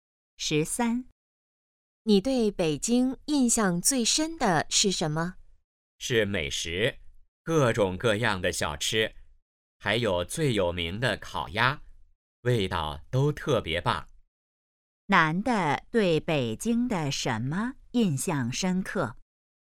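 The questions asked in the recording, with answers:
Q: 男的对北京的什么印象深刻?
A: 美食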